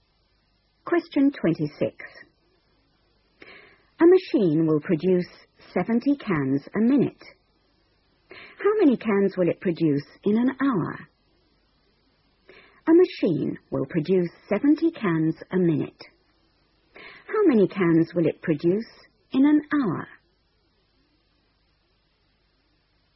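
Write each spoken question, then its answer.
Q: How many cans will it produce in an hour?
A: 4200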